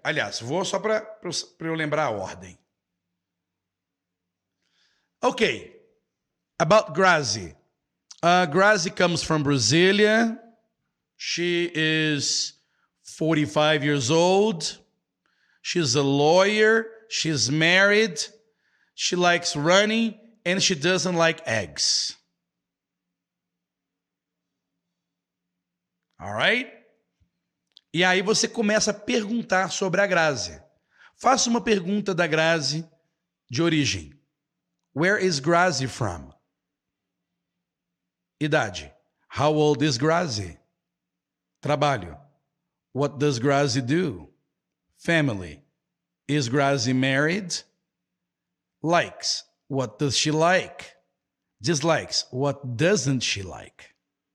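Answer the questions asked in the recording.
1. Brasília
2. 45
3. She's a lawyer
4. Yes, she is married
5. Running
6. Eggs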